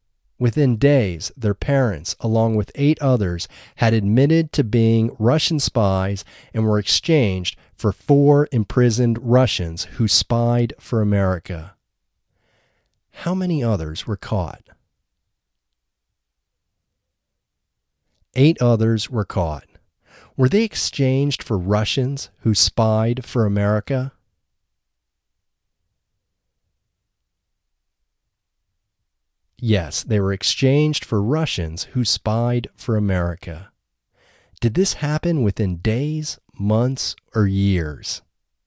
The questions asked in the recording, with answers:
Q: How many others were caught?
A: Eight others were caught.

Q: Did this happen within days, months, or years?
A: This happened within days.